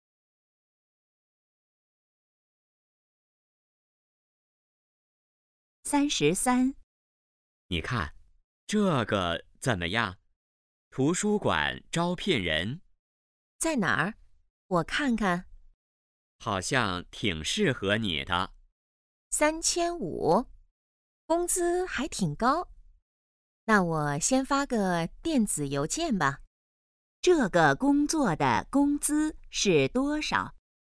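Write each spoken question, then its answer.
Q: 这个工作的工资是多少?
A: 3500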